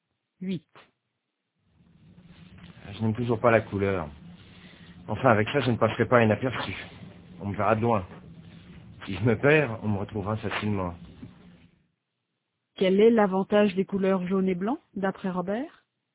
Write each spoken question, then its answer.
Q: Quel est l'avantage des couleurs jaune et blanc, d'après Robert?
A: On le verra de loin. S'il se perd, on le retrouvera facilement.